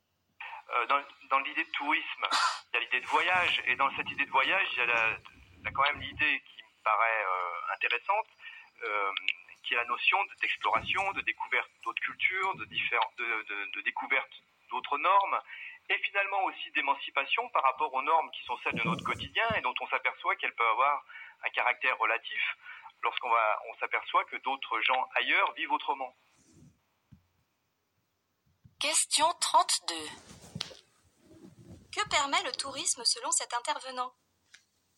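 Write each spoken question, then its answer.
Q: Que permet le tourisme selon cet intervenant ?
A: De découvrir d'autres cultures et d'autres normes, et de s'émanciper des normes du quotidien en voyant qu'elles sont relatives.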